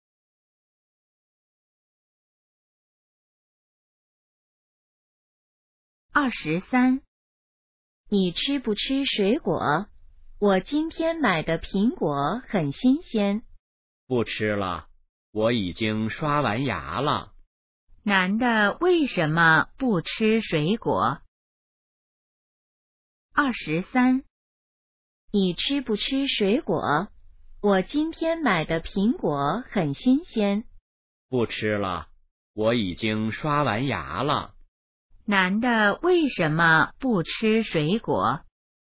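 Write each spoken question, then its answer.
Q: 男的为什么不吃水果?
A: 已经刷完牙了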